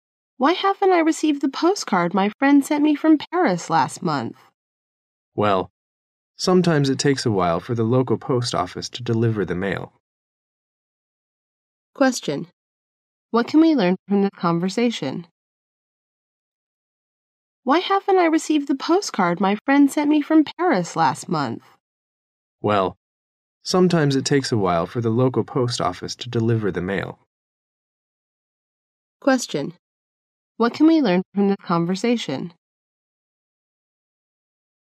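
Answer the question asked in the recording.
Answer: The local post office is slow to deliver mail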